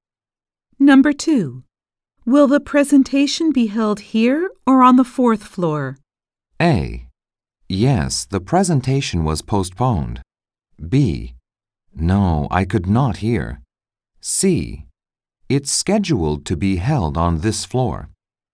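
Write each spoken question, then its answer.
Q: Will the presentation be held here or on the 4th floor?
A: C: It's scheduled to be held on this floor.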